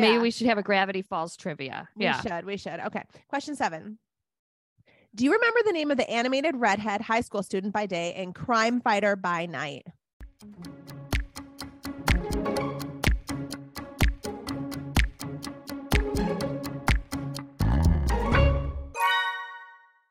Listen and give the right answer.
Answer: Kim Possible.